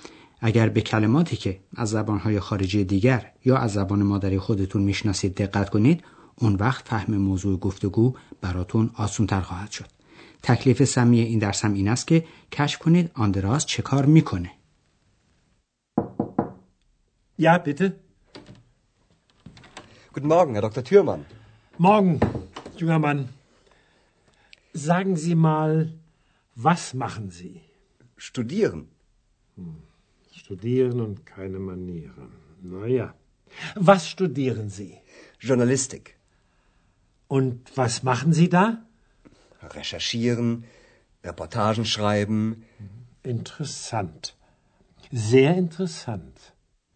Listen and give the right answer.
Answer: بله آندراس تحصیل میکنه در رشته روزنامه نگاری